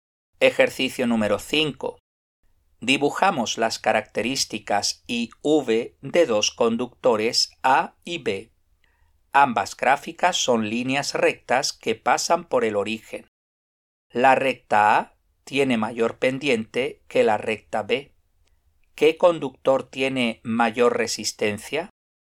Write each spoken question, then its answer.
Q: ¿Qué conductor tiene mayor resistencia?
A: Luego la mayor resistencia la tiene la recta de menor pendiente, que es la B.